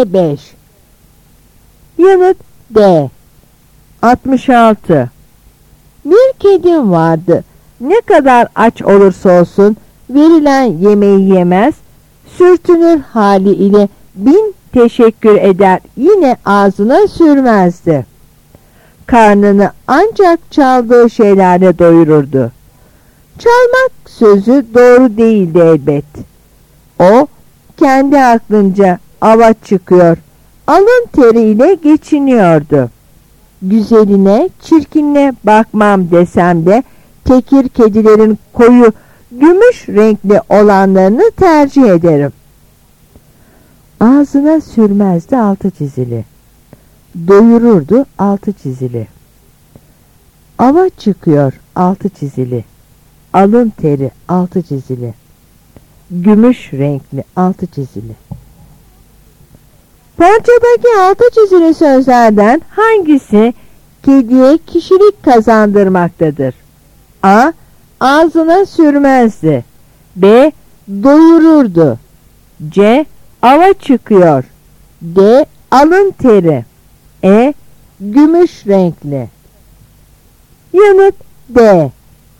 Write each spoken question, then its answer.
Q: Parçadaki altı çizili sözlerden hangisi kediye kişilik kazandırmaktadır?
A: Yanıt D.